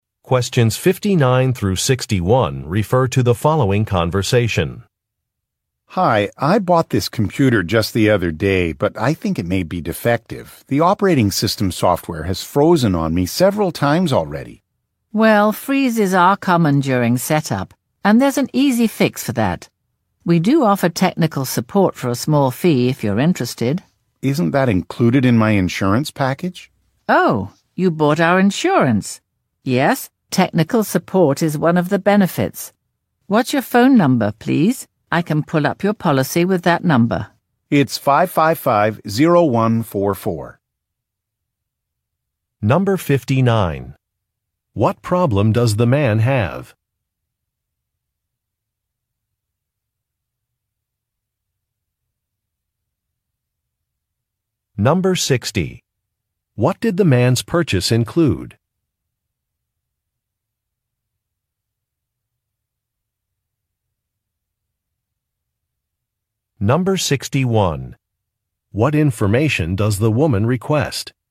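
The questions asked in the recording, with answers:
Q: What problem does the man have?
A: His new computer's operating system keeps freezing.

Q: What did the man's purchase include?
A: An insurance package that includes technical support.

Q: What information does the woman request?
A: His phone number.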